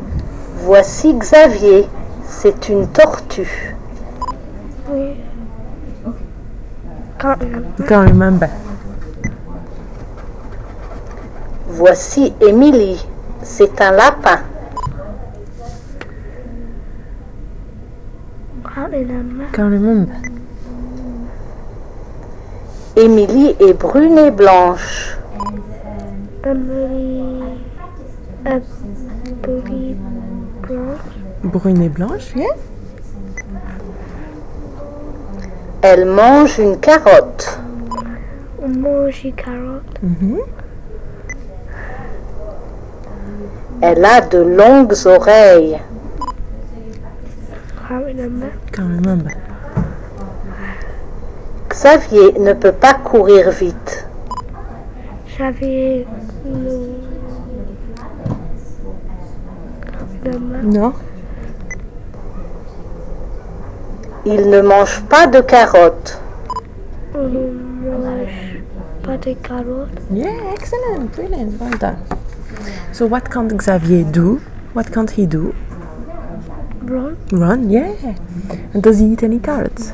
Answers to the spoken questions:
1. Run, yeah.
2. No.